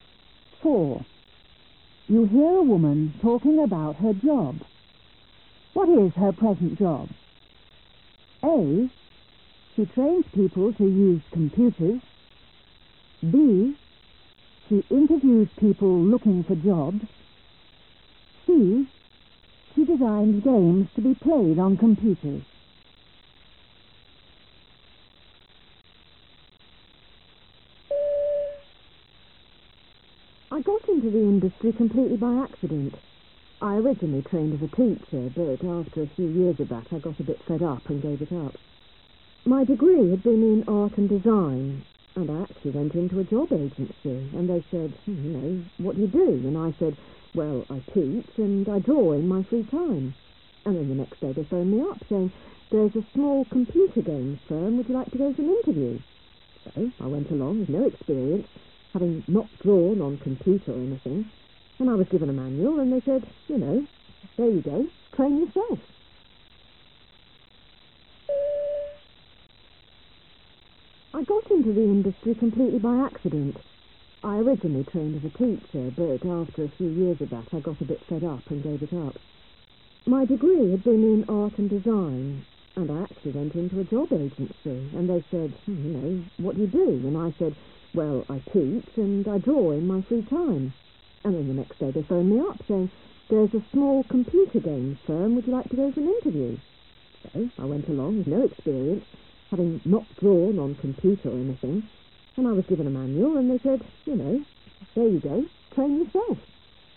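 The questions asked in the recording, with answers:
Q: What is her present job?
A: C: She designs games to be played on computers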